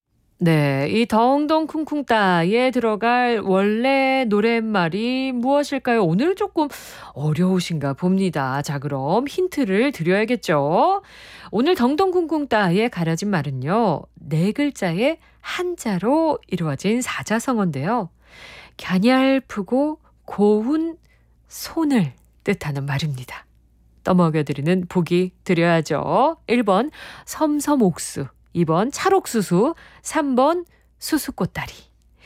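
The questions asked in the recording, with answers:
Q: 네, 이 덩덩 쿵쿵따에 들어갈 원래 노랫말이 무엇일까요?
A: 1번: 섬섬옥수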